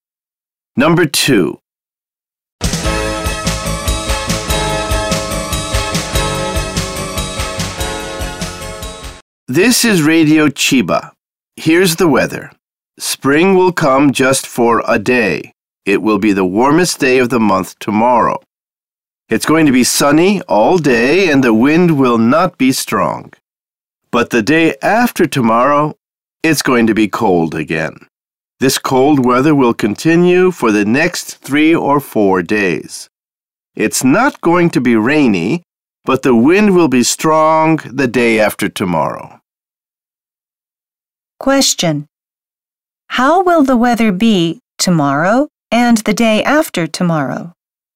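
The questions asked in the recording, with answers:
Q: Question.How will the weather be tomorrow and the day after tomorrow?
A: Tomorrow warm and sunny with little wind; the day after tomorrow cold and windy, but not rainy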